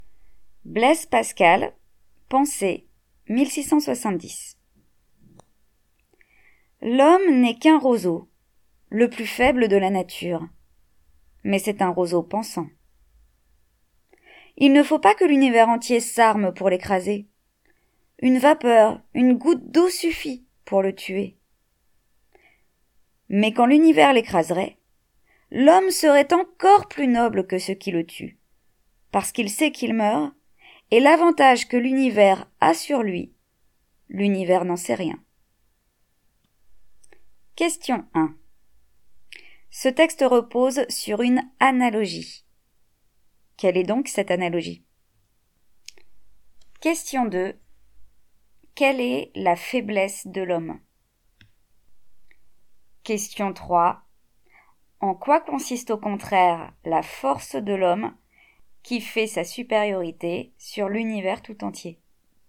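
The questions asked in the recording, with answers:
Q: Ce texte repose sur une analogie. Quelle est donc cette analogie?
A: L'homme est comparé à un roseau (un roseau pensant)

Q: Quelle est la faiblesse de l'homme?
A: Il est le plus faible de la nature : une vapeur, une goutte d'eau suffit pour le tuer

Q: En quoi consiste au contraire la force de l'homme qui fait sa supériorité sur l'univers tout entier?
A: Il pense : il sait qu'il meurt, alors que l'univers ne sait rien de son avantage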